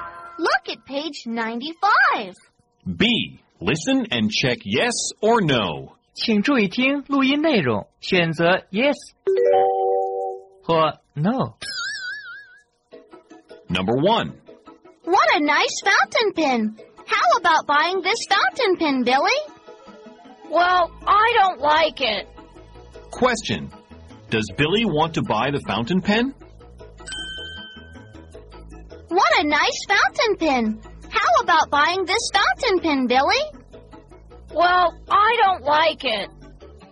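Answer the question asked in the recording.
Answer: No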